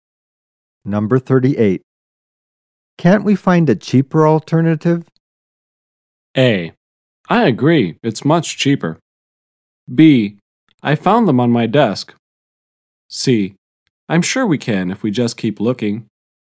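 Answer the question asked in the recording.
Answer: C: I'm sure we can if we just keep looking.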